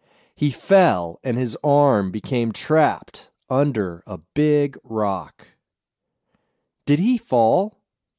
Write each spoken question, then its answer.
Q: Did he fall?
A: Yes, he fell.